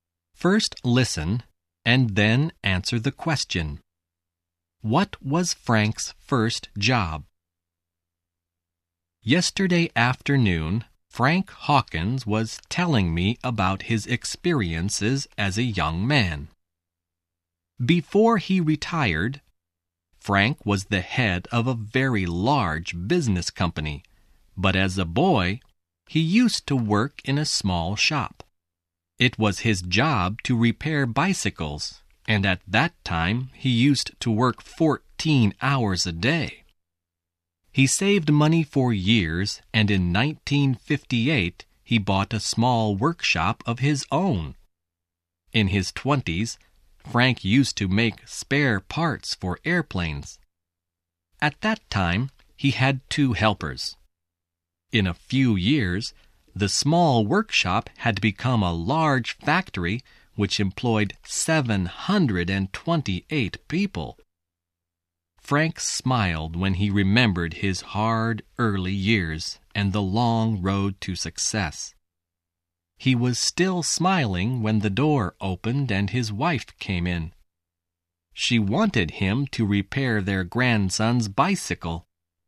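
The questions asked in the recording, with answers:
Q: What was Frank's first job?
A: He repaired bicycles in a small shop.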